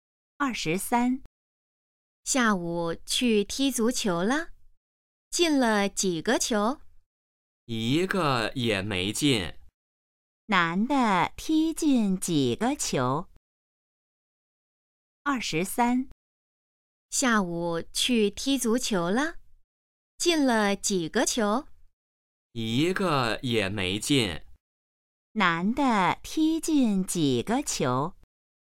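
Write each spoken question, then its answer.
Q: 男的踢进几个球?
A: 一个也没进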